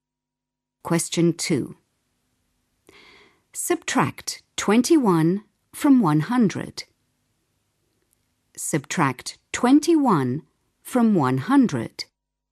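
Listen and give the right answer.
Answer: 79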